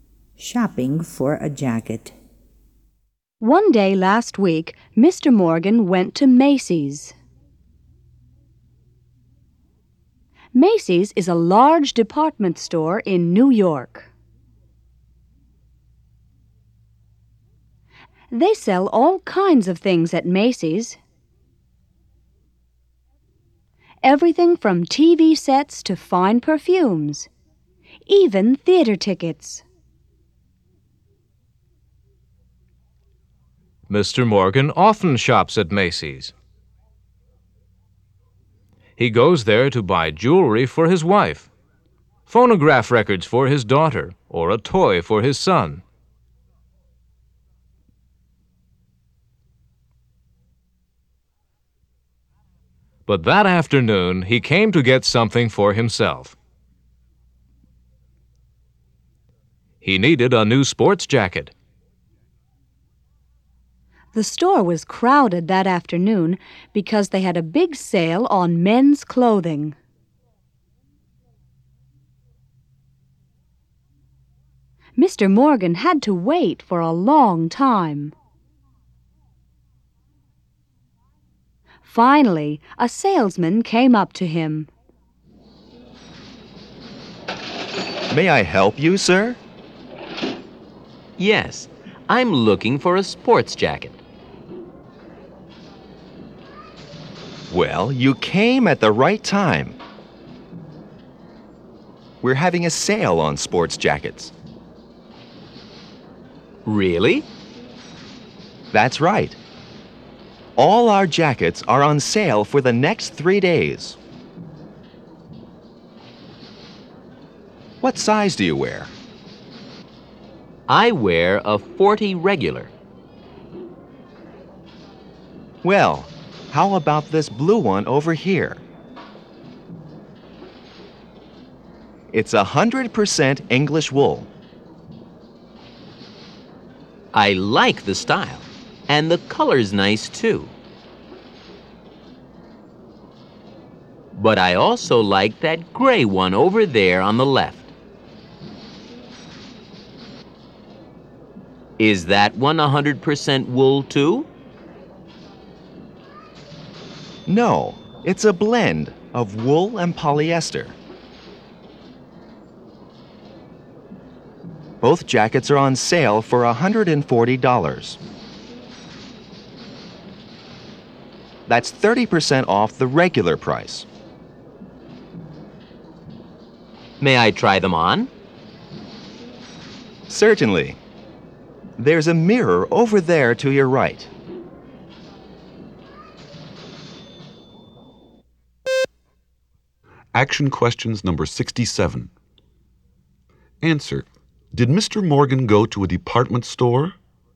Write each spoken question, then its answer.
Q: Did Mr. Morgan go to a department store?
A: Yes, he did.